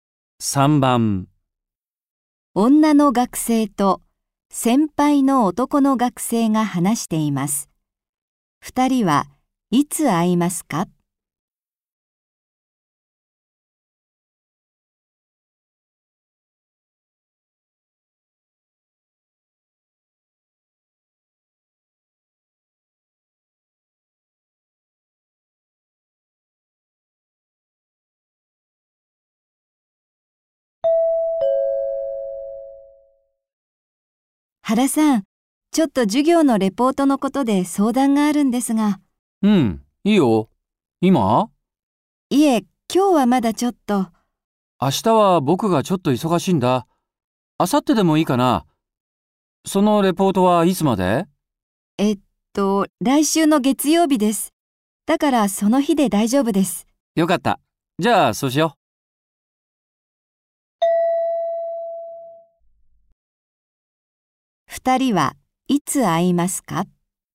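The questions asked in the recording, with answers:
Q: 2人はいつ会いますか?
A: 明後日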